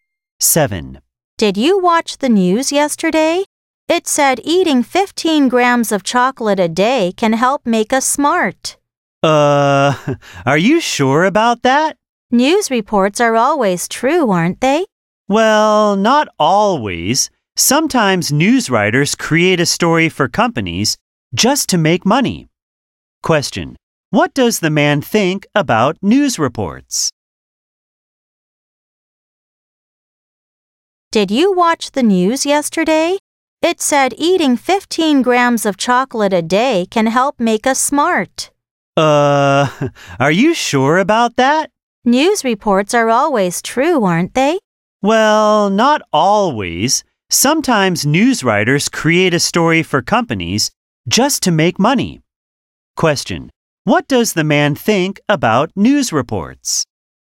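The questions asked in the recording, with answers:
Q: What does the man think about news reports?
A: They are not always true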